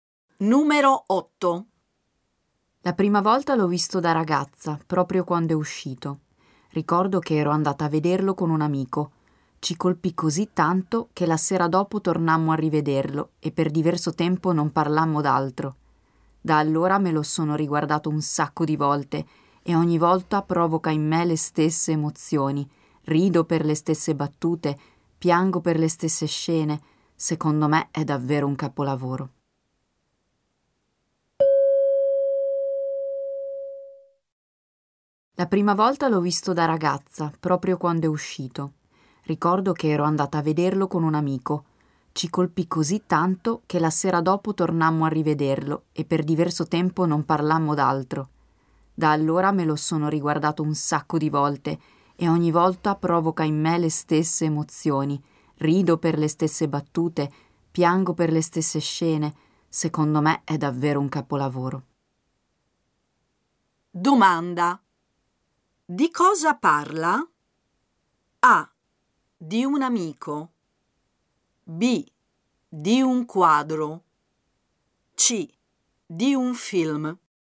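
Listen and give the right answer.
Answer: C: Di un film.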